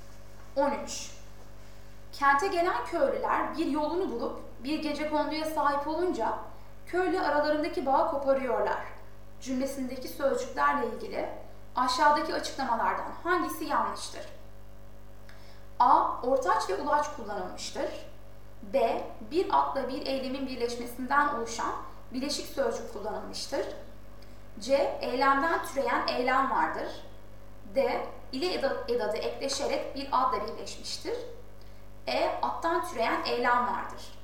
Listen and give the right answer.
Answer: Doğru yanıt E.